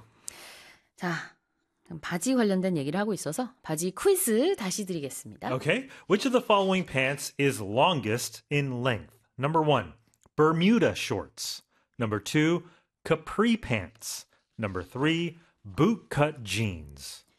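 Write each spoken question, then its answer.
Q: Okay, which of the following pants is longest in length?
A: 3: bootcut jeans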